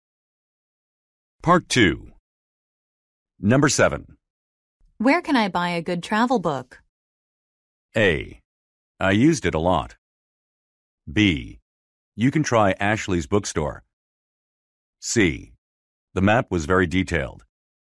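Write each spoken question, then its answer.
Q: Where can I buy a good travel book?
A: B: You can try Ashley's bookstore.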